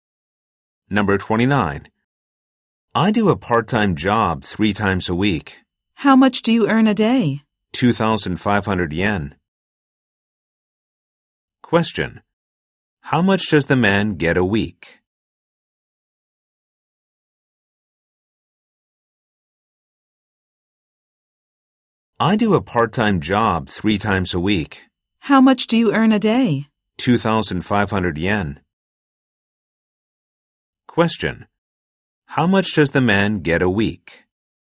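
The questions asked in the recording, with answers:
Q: How much does the man get a week?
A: 7,500 yen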